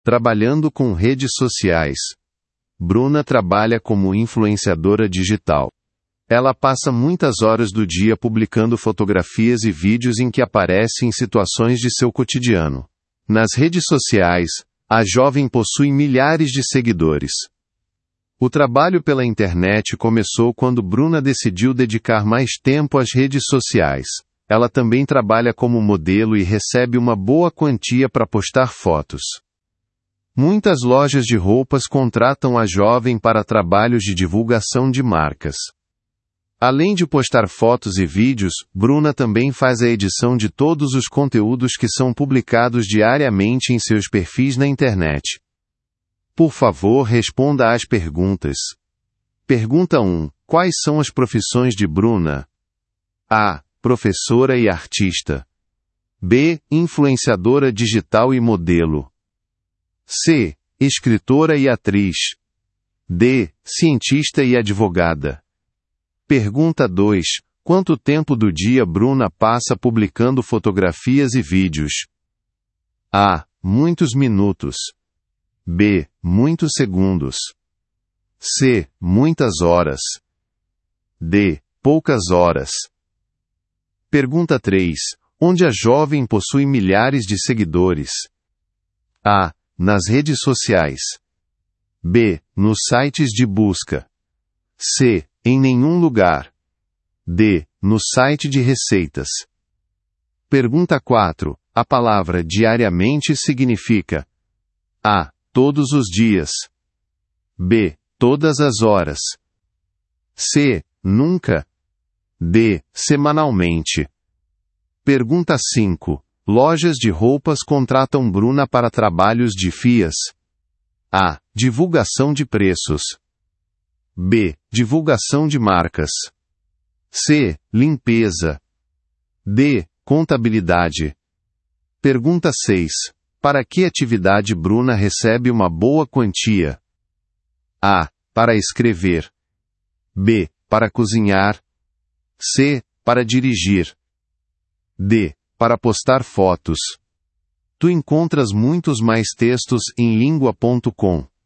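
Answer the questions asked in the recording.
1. B: Influenciadora digital e modelo.
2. C: Muitas horas.
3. A: Nas redes sociais.
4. A: Todos os dias.
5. B: Divulgação de marcas.
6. D: Para postar fotos.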